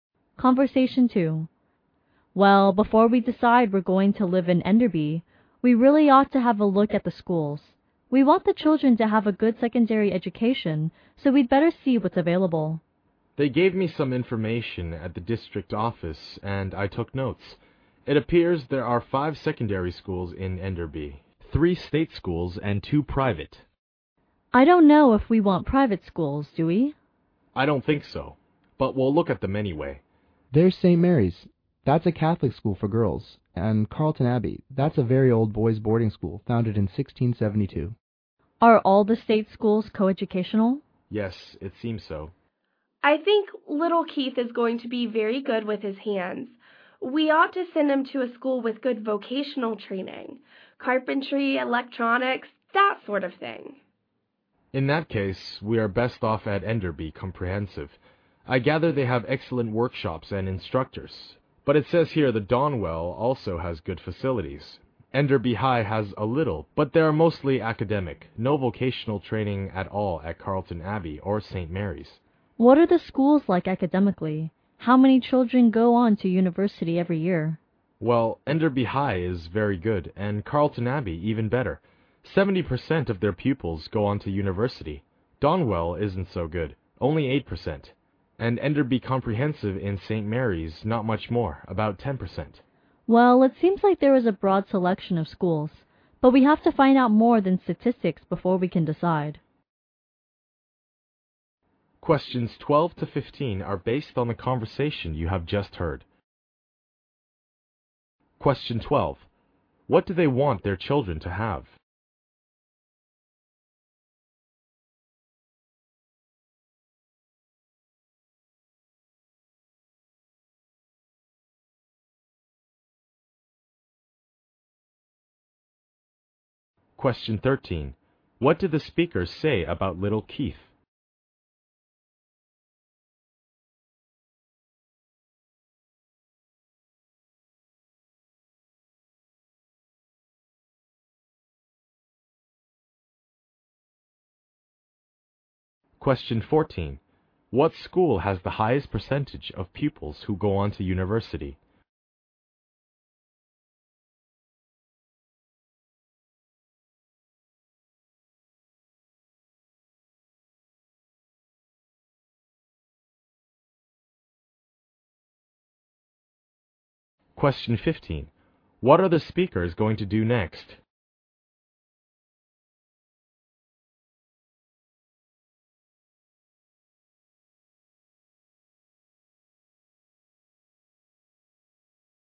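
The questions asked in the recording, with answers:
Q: What do they want their children to have?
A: A good secondary education.

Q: What did the speaker say about little Keith?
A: He will be good with his hands and should get vocational training.

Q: What school has the highest percentage of pupils who go on to university?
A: Carlton Abbey.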